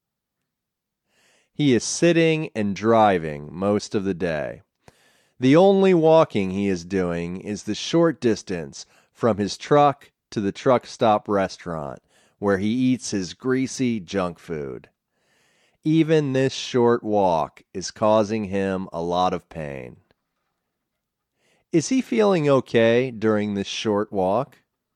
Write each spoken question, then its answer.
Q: Is he feeling okay during this short walk?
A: No, he's not feeling okay.